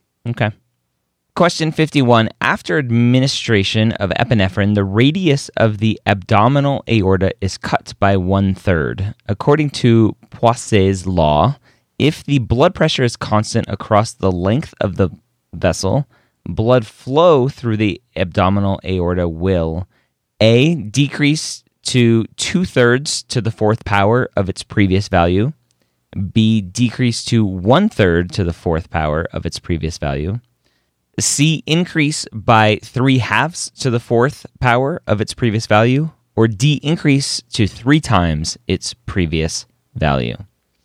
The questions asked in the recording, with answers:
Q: According to Poiseuille's law, if the blood pressure is constant across the length of the vessel, blood flow through the abdominal aorta will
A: that's answer choice A, right?